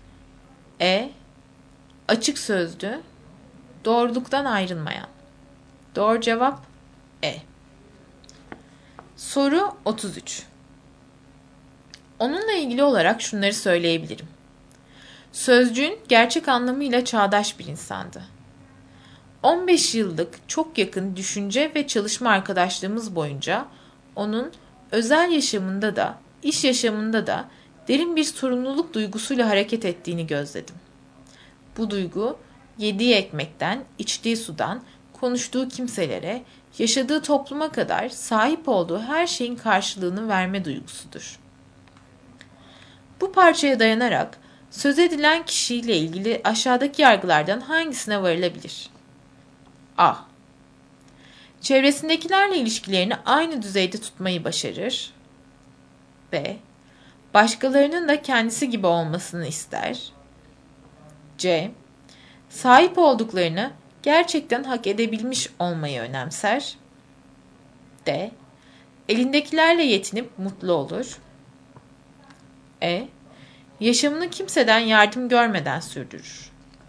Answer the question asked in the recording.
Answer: Doğru cevap C.